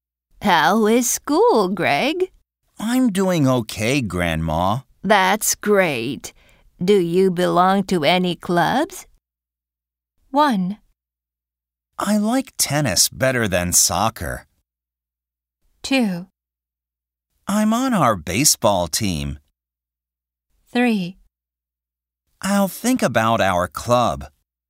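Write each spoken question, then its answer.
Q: Do you belong to any clubs?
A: 2: I'm on our baseball team.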